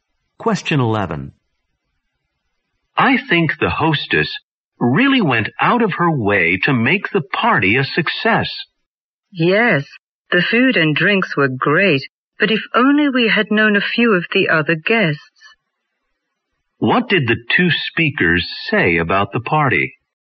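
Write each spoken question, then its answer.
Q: What did the 2 speakers say about the party?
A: The food and drinks were great, but they didn't know many of the other guests.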